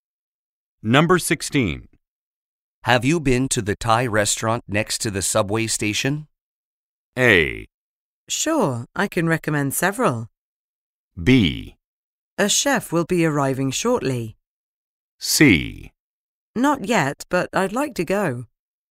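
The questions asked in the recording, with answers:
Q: Have you been to the Thai restaurant next to the subway station?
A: C: Not yet, but I'd like to go.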